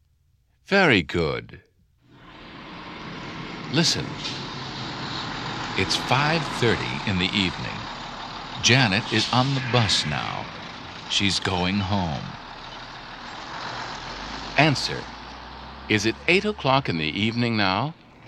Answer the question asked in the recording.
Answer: No, it's not.